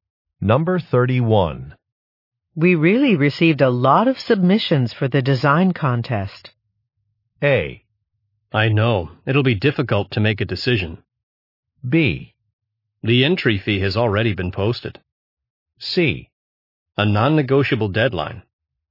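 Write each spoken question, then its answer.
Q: We really received a lot of submissions for the design contest.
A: A: I know. It'll be difficult to make a decision.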